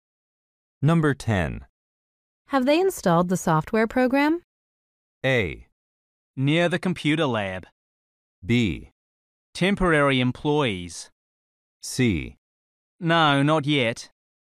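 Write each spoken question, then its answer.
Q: Have they installed the software program?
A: C: No, not yet.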